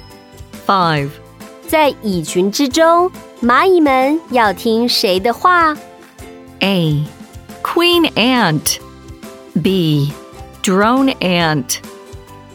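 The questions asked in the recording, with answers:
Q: 在蚁群之中,蚂蚁们要听谁的话?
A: A: Queen Ant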